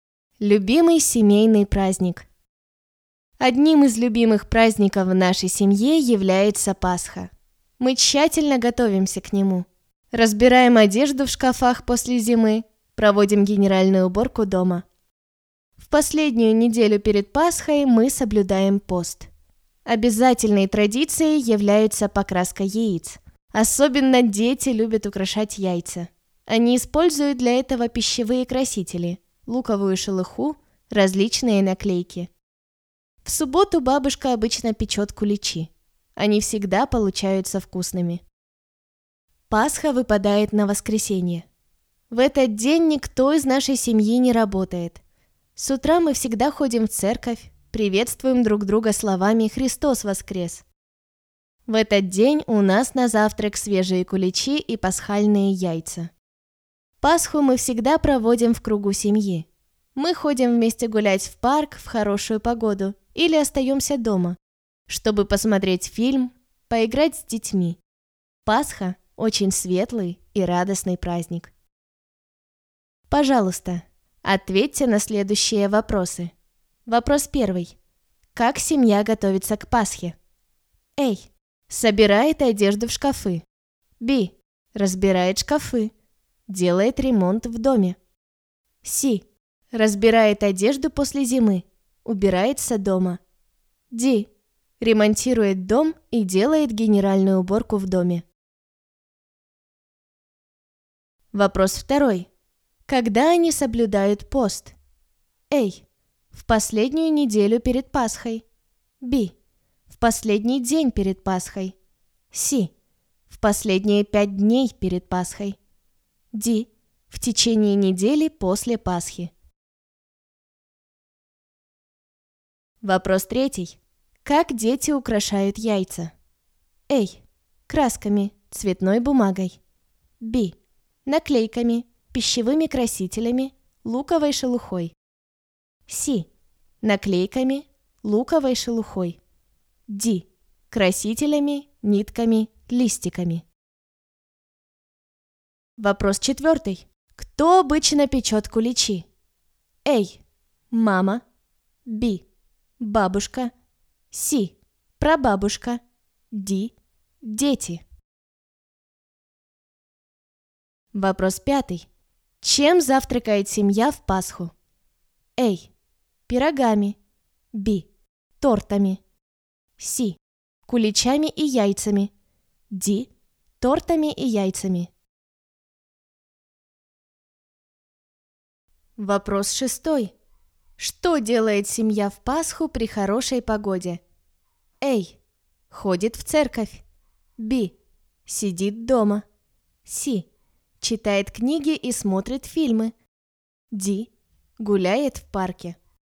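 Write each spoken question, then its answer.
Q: Как семья готовится к Пасхе?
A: C: Разбирает одежду после зимы. Убирается дома.

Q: Когда они соблюдают пост?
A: A: В последнюю неделю перед Пасхой.

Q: Как дети украшают яйца?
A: Б: Наклейками, пищевыми красителями, луковой шелухой.

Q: Кто обычно печет куличи?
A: Б: Бабушка.

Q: Чем завтракает семья в Пасху?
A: C: Куличами и яйцами.

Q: Что делает семья в Пасху при хорошей погоде?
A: Д: Гуляет в парке.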